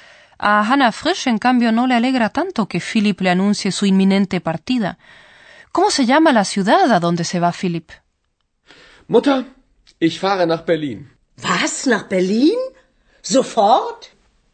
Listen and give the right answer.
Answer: Pues sí, Philipp parte a Berlín.